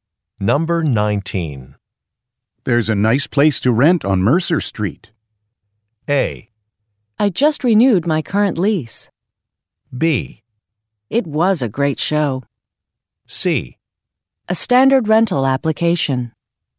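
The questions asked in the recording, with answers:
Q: There's a nice place to rent on Mercer Street.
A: A: I just renewed my current lease.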